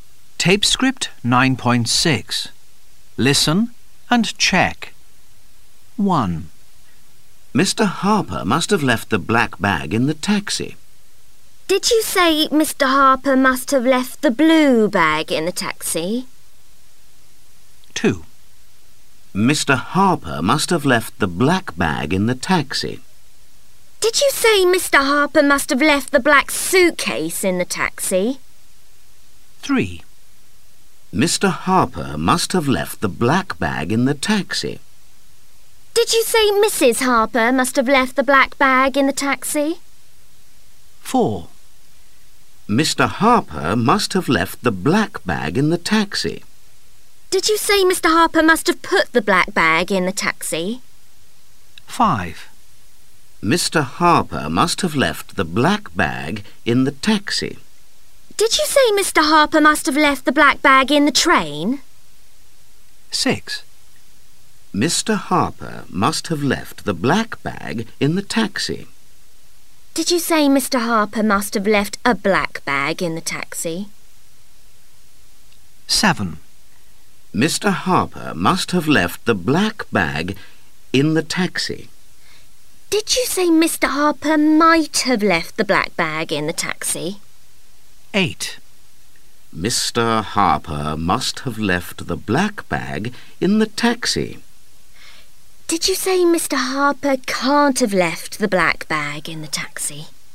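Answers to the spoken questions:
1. No, the black bag.
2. No, the black bag.
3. No, Mr. Harper.
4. No, left it.
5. No, in the taxi.
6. No, the black bag.
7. No, must have.
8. No, must have.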